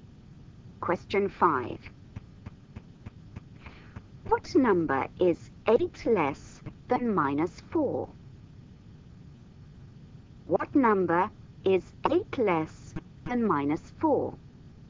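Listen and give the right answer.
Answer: -12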